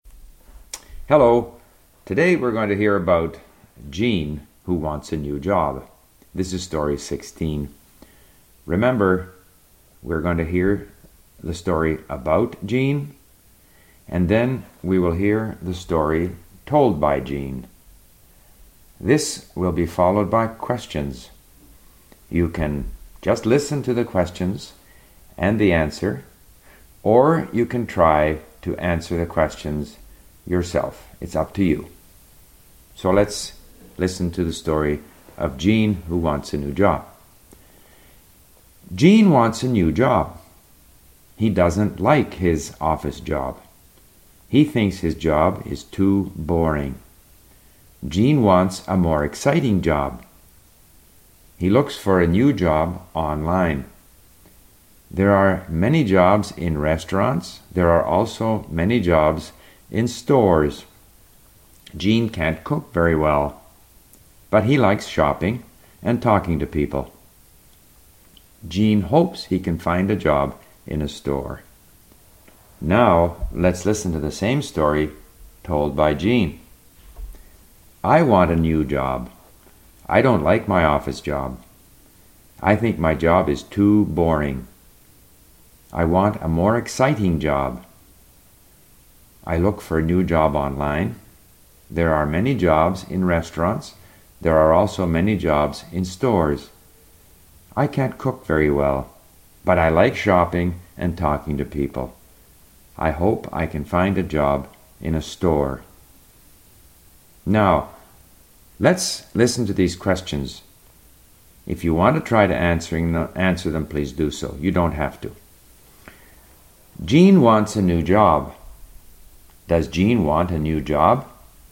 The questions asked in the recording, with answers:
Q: Does Jean want a new job?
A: Yes, Jean wants a new job.